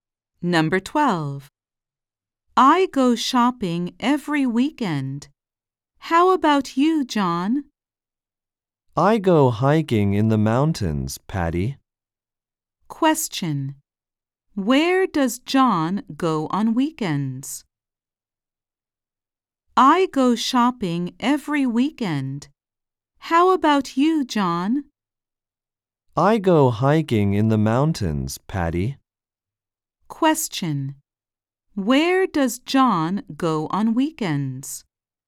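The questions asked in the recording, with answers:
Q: Where does John go on weekends?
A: To the mountains (hiking)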